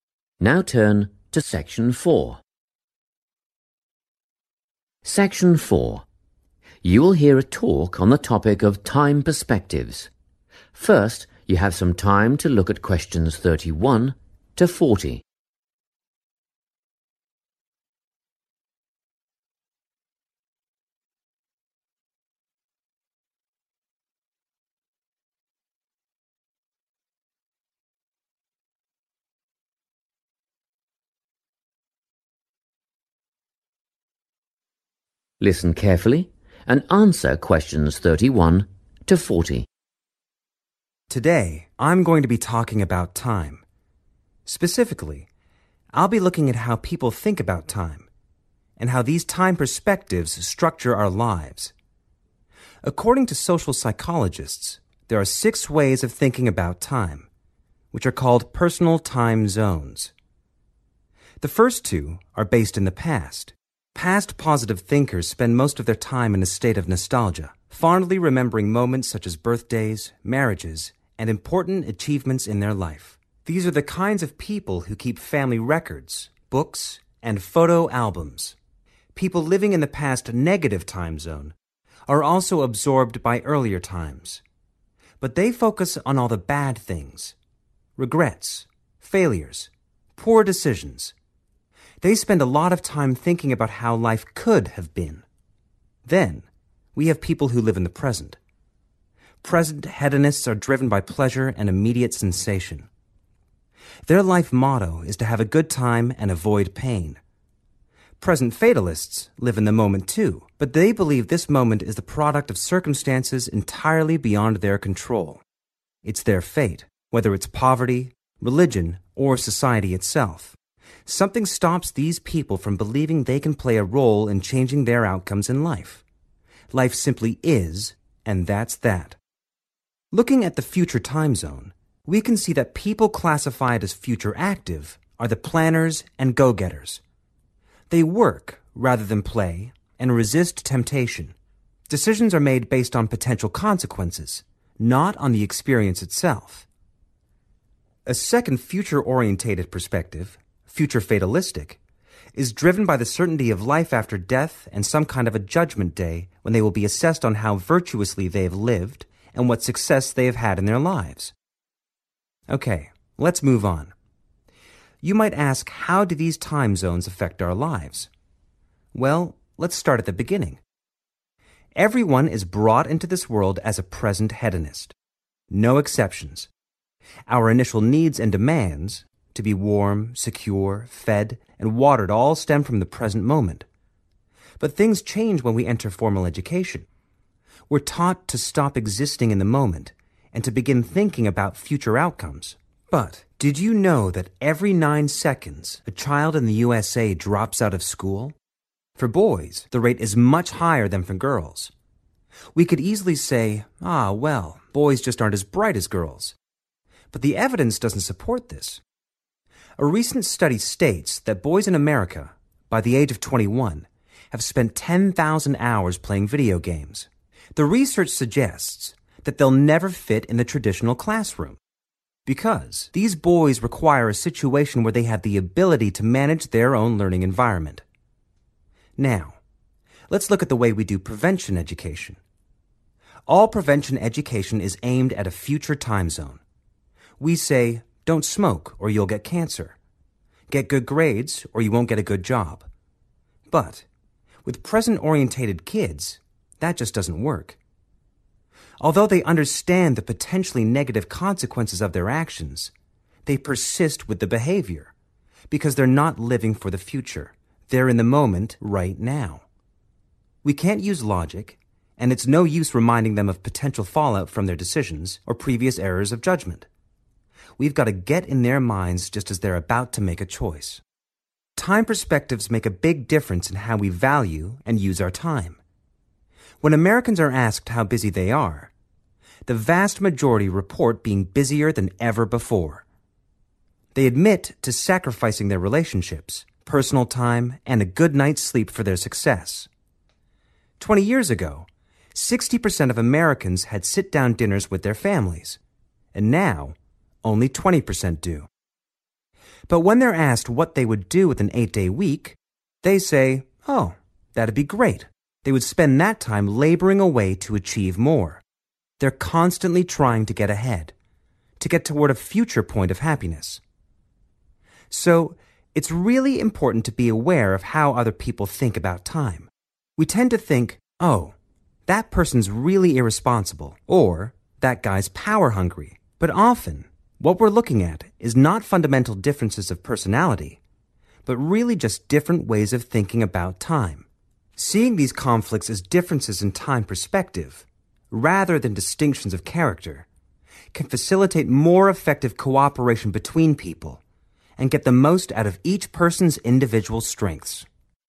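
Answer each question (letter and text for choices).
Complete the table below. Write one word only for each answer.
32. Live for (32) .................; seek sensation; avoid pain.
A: pleasure

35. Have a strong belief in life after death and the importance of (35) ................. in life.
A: success

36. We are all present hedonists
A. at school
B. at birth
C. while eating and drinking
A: B. at birth

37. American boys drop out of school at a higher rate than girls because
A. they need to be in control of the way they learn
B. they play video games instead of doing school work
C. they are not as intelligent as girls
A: A. they need to be in control of the way they learn

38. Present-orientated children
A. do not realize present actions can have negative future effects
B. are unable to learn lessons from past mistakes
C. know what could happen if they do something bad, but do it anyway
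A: C. know what could happen if they do something bad, but do it anyway

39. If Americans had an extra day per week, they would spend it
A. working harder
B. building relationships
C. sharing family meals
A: A. working harder

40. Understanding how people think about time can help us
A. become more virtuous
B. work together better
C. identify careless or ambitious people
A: B. work together better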